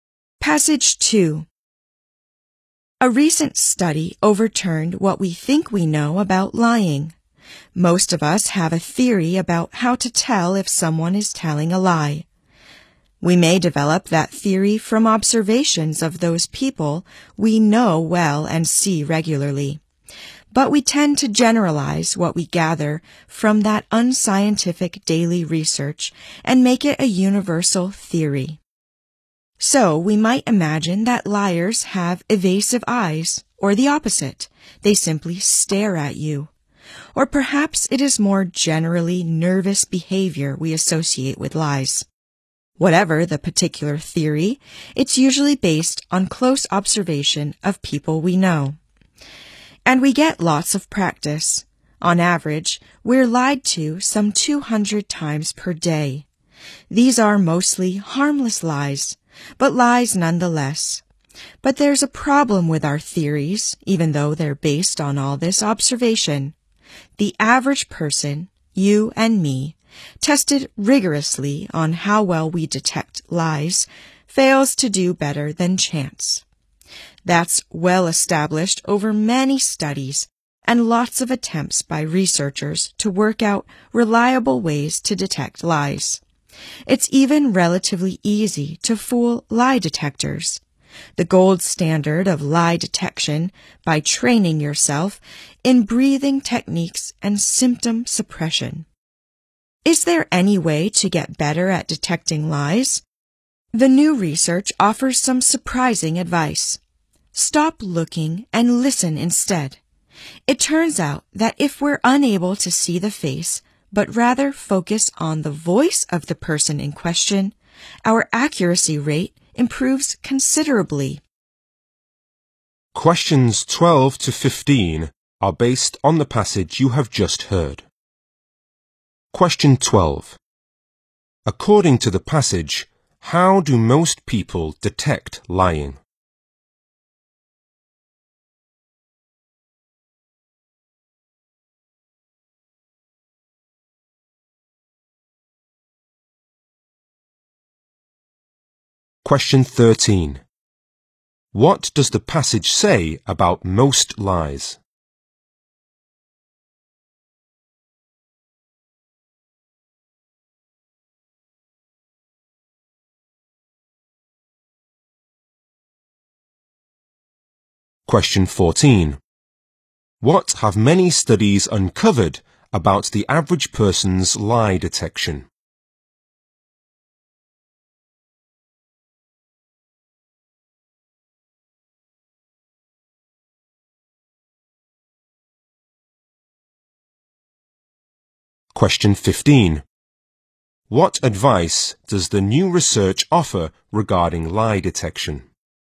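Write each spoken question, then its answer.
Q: According to the passage, how do most people detect lying?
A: Using theories based on close observation of people they know.

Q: What does the passage say about most lies?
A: Most are harmless.

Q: What have many studies uncovered about the average person's lie detection?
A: People do no better than chance.

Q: What advice does the new research offer regarding lie detection?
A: Stop looking and listen to the voice instead.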